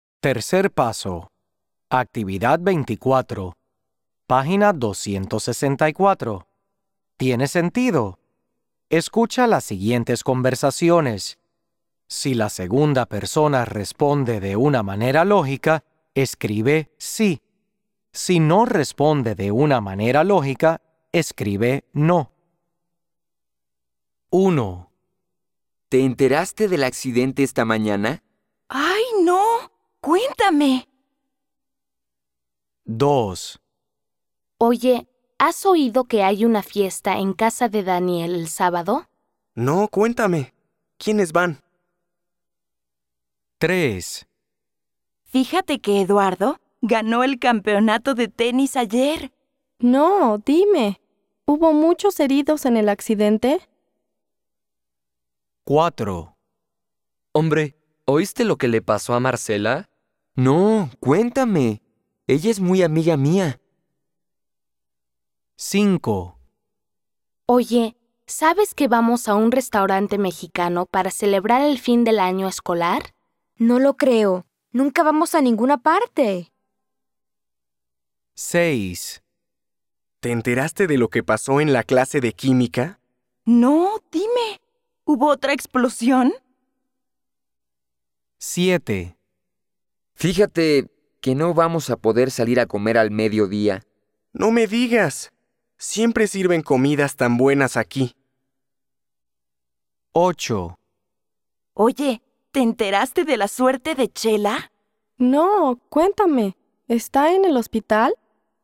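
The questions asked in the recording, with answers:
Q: ¿Te enteraste del accidente esta mañana?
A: Sí

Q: Oye, ¿has oído que hay una fiesta en casa de Daniel el sábado?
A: Sí

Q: Fíjate que Eduardo ganó el campeonato de tenis ayer.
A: No

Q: Hombre, ¿oíste lo que le pasó a Marcela?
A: Sí

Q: ¿Te enteraste de lo que pasó en la clase de química?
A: Sí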